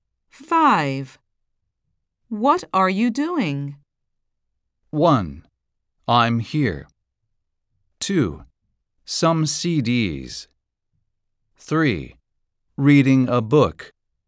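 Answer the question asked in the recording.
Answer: 3: Reading a book.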